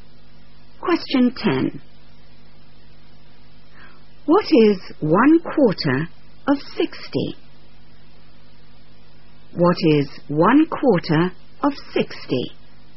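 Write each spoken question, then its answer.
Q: What is 1/4 of 60?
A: 15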